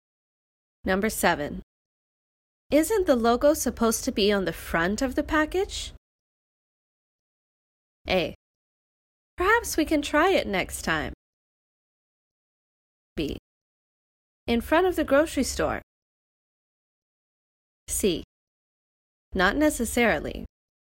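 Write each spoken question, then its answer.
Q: Isn't the logo supposed to be on the front of the package?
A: C: Not necessarily.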